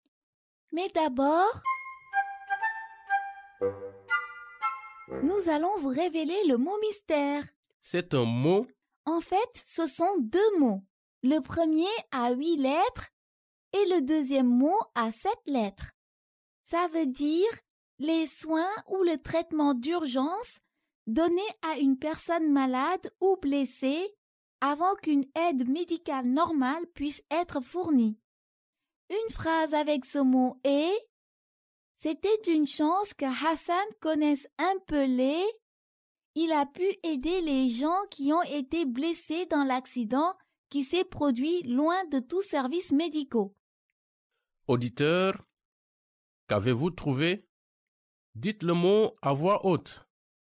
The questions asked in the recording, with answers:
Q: Auditeur, qu'avez-vous trouvé?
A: Le mot mystère d'aujourd'hui est premier secours.